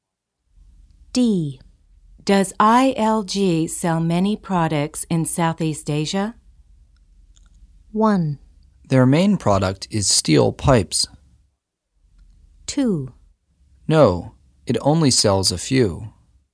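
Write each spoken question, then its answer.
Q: Does ILG sell many products in Southeast Asia?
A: 2: No, it only sells a few.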